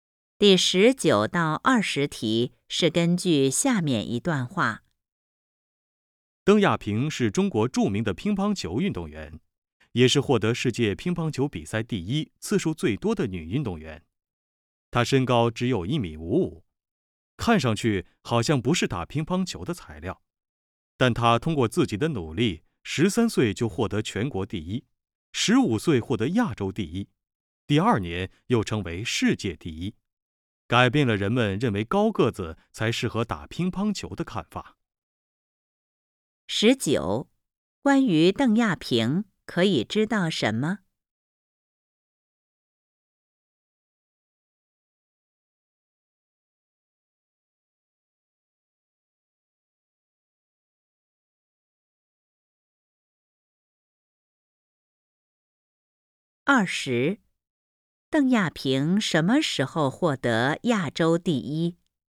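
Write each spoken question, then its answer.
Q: 邓亚萍什么时候获得亚洲第一?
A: 15岁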